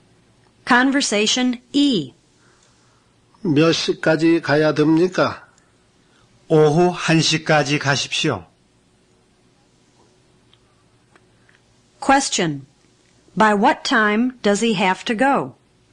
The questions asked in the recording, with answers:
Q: By what time does he have to go?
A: He has to go by 1 p.m.